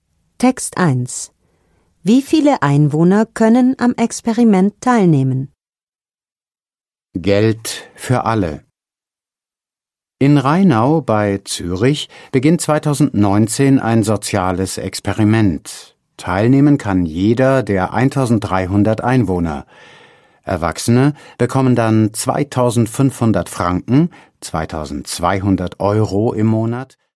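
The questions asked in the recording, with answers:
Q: Wie viele Einwohner können am Experiment teilnehmen?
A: Alle 1300 Einwohner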